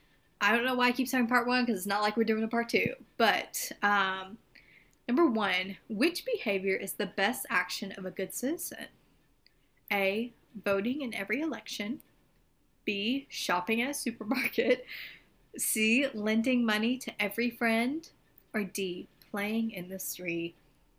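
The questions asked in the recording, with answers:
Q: which behavior is the best action of a good citizen?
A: A: Voting in every election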